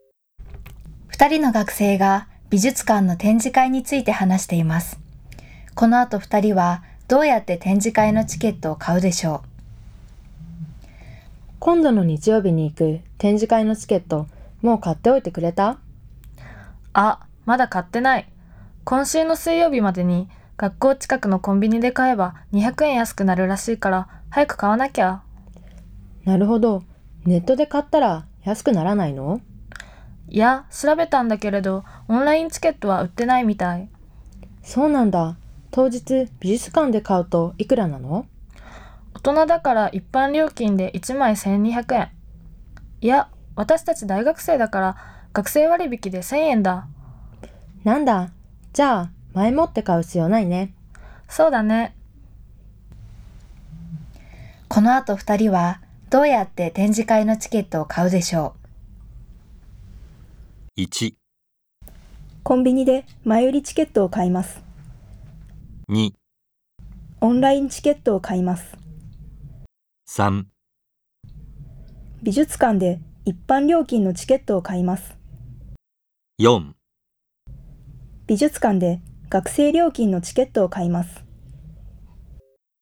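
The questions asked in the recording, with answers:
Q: この後二人はどうやって展示会のチケットを買うでしょう。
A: 4: 美術館で学生料金のチケットを買います。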